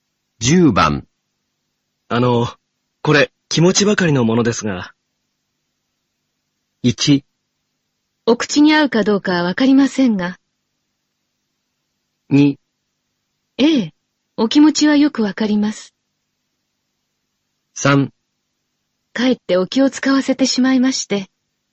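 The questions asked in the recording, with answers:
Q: これ、気持ちばかりのものですが。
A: 3: かえってお気を使わせてしまいまして。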